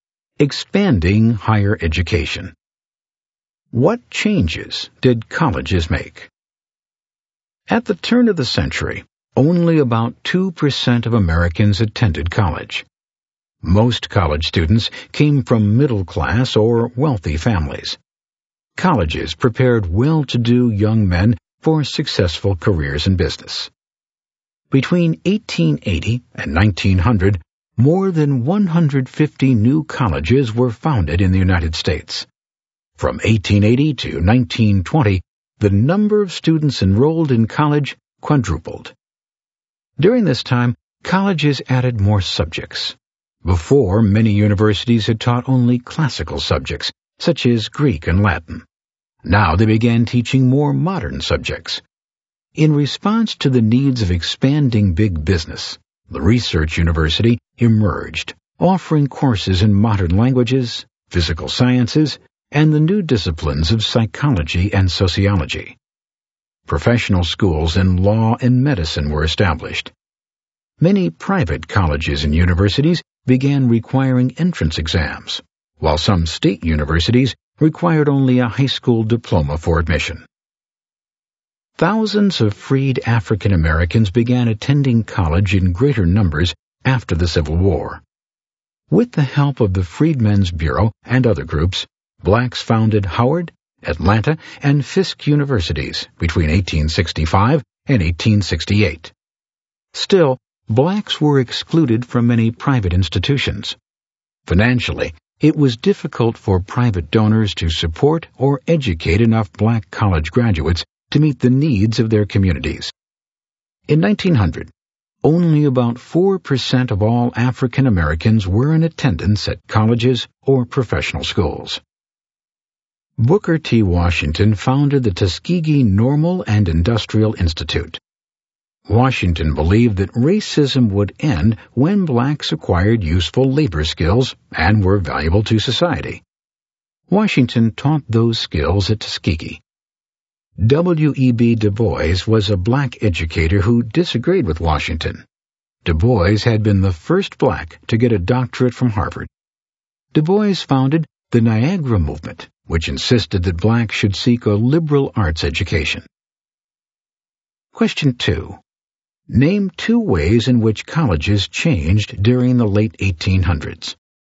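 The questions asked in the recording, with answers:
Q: Name two ways in which colleges changed during the late 1800s.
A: More than 150 new colleges were founded, and colleges added modern subjects such as sciences, psychology and sociology.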